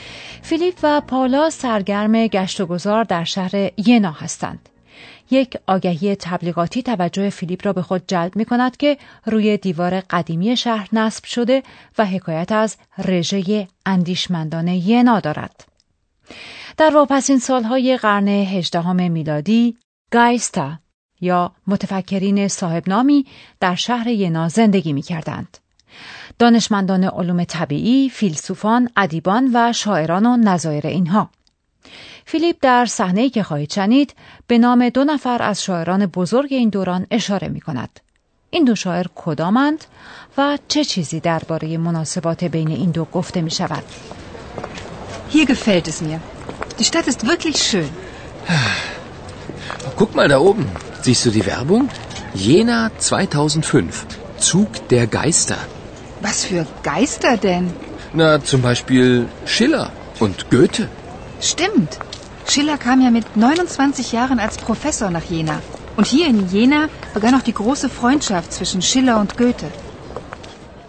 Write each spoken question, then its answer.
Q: این دو شاعر کدامند و چه چیزی درباره مناسبات بین این دو گفته می شود؟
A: فیلیپ از شیلر و گوته یاد می کند که در شمار شاعران بزرگ آلمان هستند.